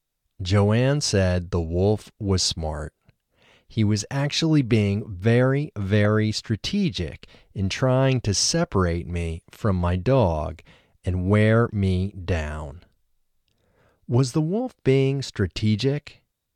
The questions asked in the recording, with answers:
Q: Was the wolf being strategic?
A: Yes, the wolf was being very strategic.